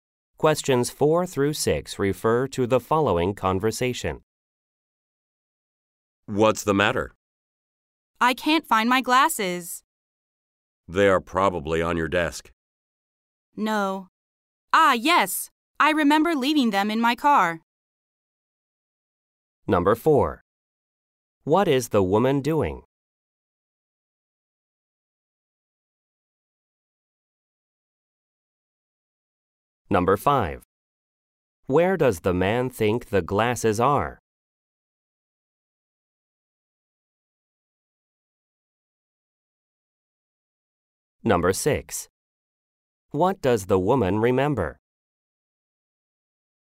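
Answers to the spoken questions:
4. Looking for her glasses
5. On her desk
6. She left her glasses in her car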